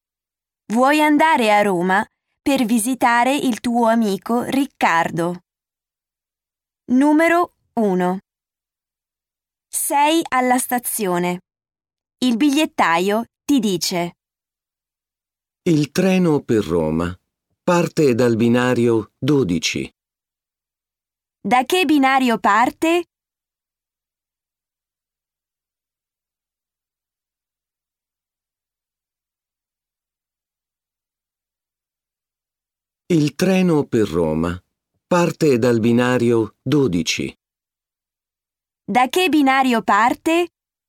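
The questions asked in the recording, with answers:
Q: Da che binario parte?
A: Dal binario 12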